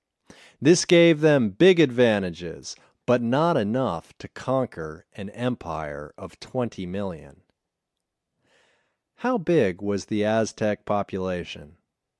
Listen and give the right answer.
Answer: The Aztecs had a population of 20 million.